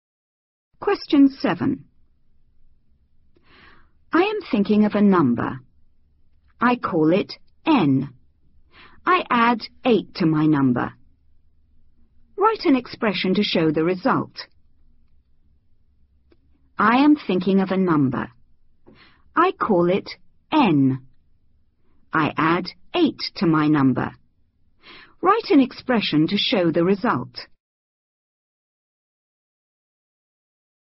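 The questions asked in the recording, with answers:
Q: Write an expression to show the result.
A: N + 8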